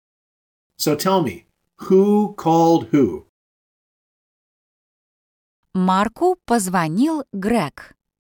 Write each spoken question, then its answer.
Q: So tell me, who called who?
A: Greg called Mark.